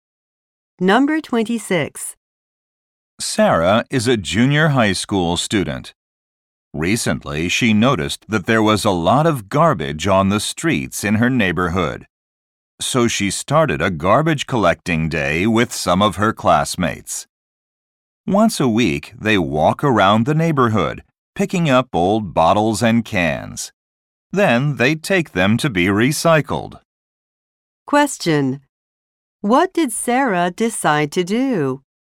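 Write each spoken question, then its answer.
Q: What did Sarah decide to do?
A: Start a garbage collecting day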